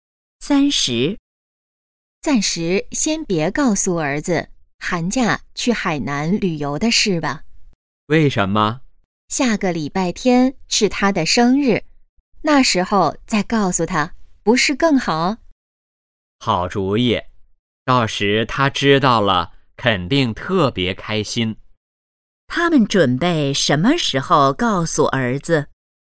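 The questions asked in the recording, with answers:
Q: 他们准备什么时候告诉儿子?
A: 下个礼拜天(儿子生日时)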